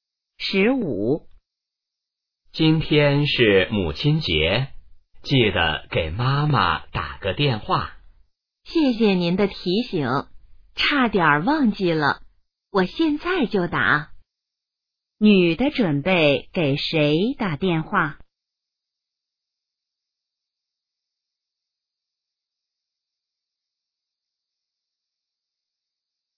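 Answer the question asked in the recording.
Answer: 妈妈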